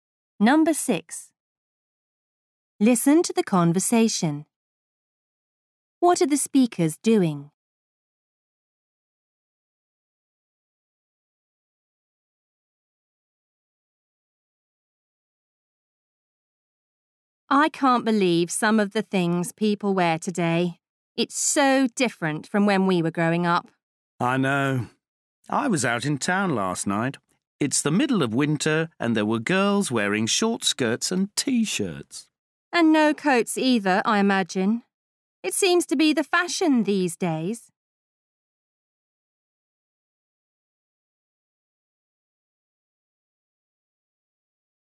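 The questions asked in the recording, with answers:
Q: What are the speakers doing?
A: Discussing/criticising what people wear today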